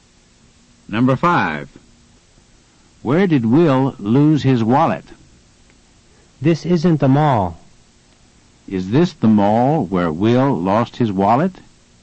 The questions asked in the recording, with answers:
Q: Is this the mall where Will lost his wallet?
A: No, it isn't.